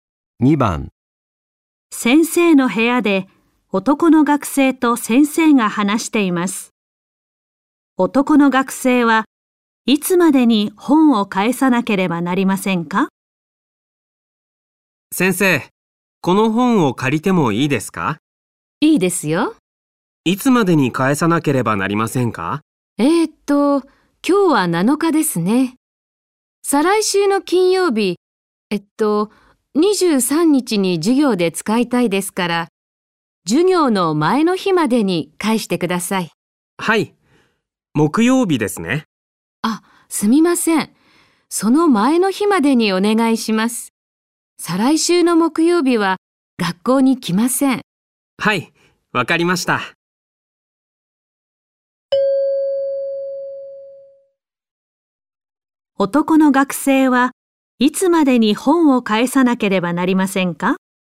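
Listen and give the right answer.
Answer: 21日(再来週の水曜日)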